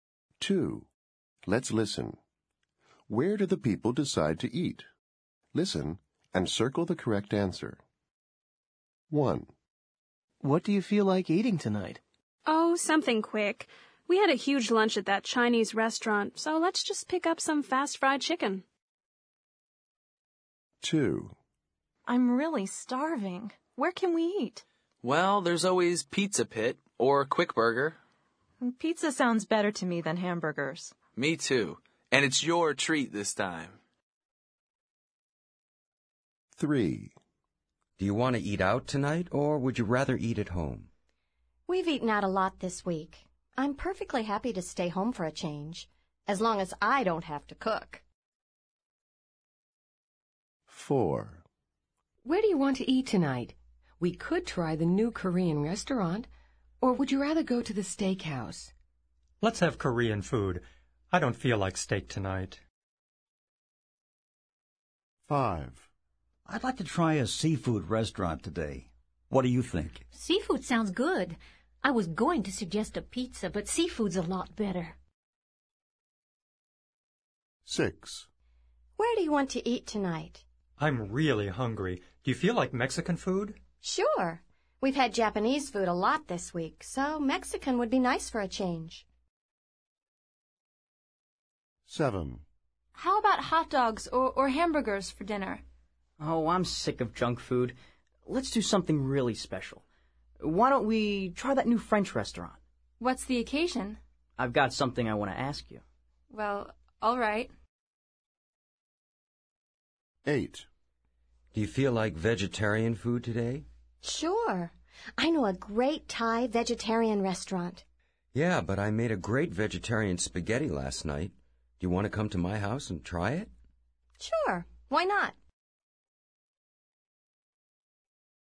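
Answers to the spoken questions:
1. a fast fried chicken place
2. Pizza Pit
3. at home
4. the new Korean restaurant
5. a seafood restaurant
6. a Mexican restaurant
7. the new French restaurant
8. at the speaker's house (vegetarian spaghetti)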